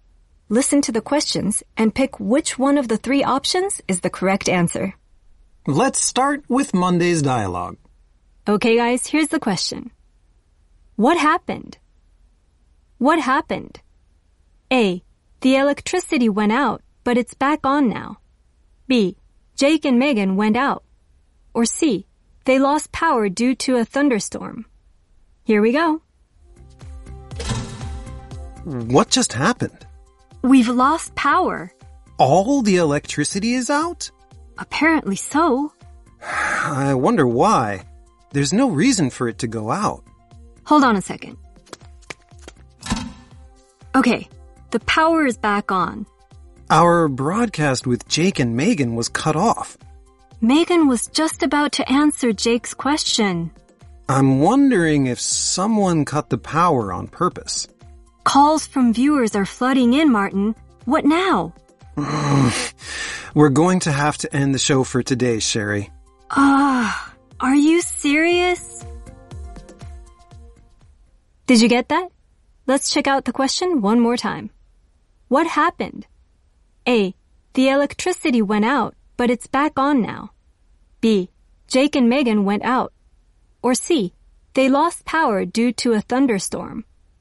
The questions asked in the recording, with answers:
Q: What happened?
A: A. The electricity went out, but it's back on now.